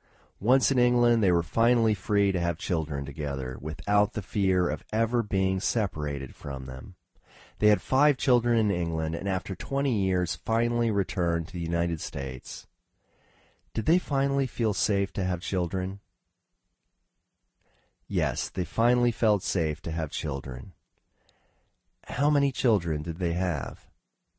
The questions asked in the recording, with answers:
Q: How many children did they have?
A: They had 5 children.